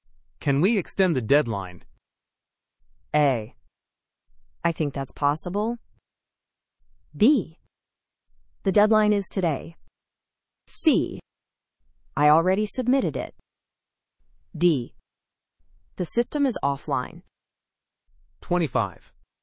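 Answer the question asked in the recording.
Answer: A: I think that's possible.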